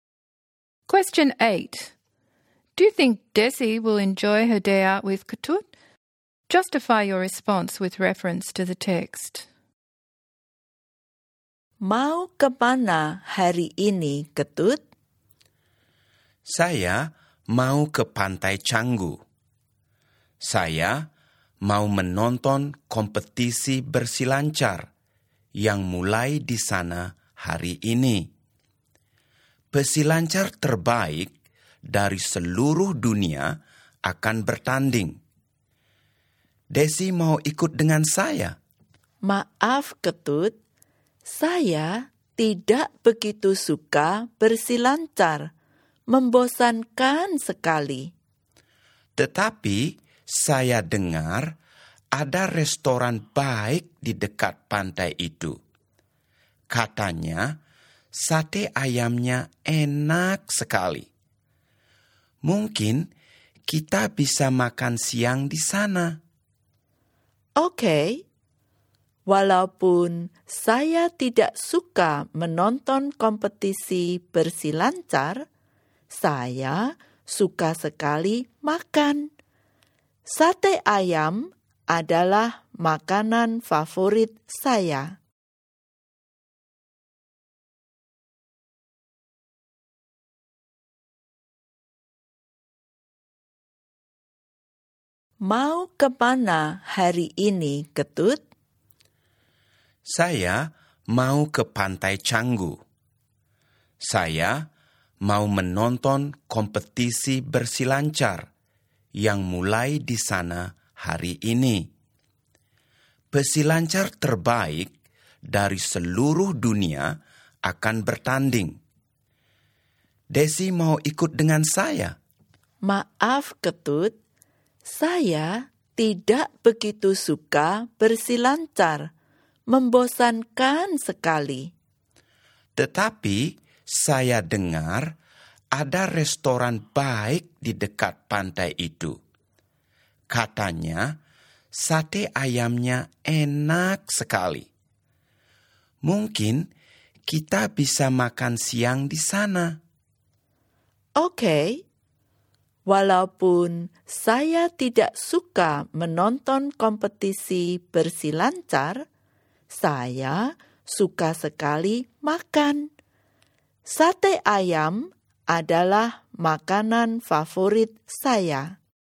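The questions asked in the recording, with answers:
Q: Do you think Desi will enjoy her day out with Kutut?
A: Yes, partly: she finds surfing boring, but she will enjoy lunch at the restaurant because chicken satay is her favourite food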